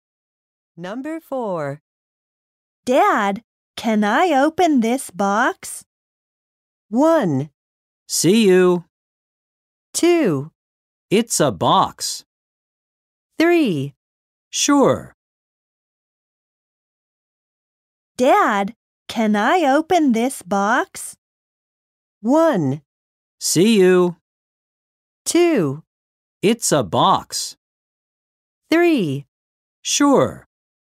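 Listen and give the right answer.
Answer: 3: Sure.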